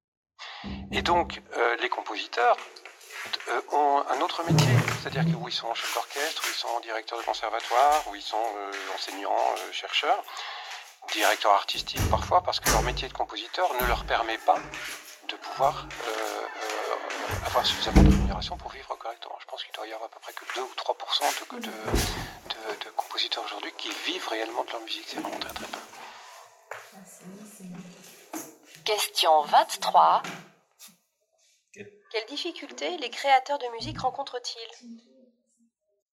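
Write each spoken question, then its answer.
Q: Quelles difficultés les créateurs de musique rencontrent-ils ?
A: Ils ne gagnent pas assez avec la composition pour vivre, donc ils ont un autre métier (seuls 2 ou 3 % en vivent).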